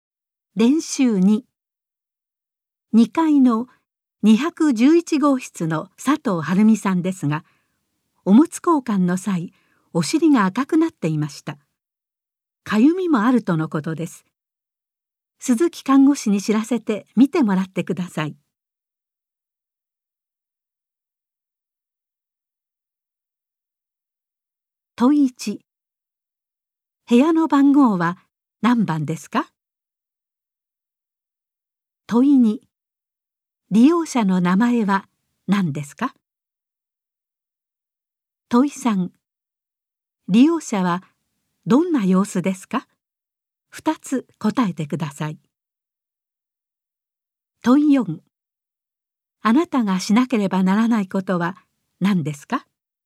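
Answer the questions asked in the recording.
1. 211号室
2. 佐藤晴美さん
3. お尻が赤くなっていて、かゆみもある
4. 鈴木看護師に知らせて見てもらう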